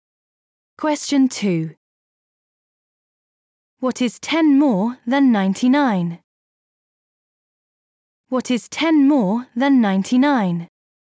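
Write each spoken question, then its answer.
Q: What is 10 more than 99?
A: 109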